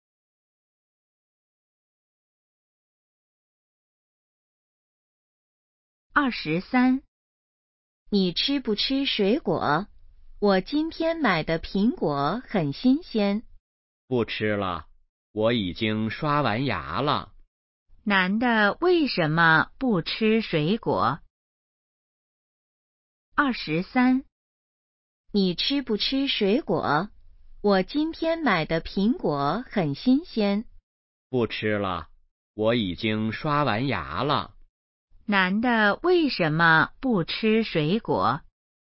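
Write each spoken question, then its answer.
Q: 男的为什么不吃水果?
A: 已经刷完牙了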